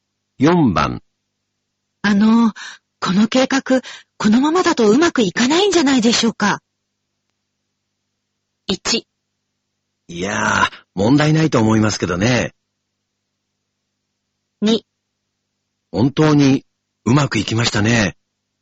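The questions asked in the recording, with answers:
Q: あの、この計画、このままだとうまくいかないんじゃないでしょうか。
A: 1: いやー、問題ないと思いますけどね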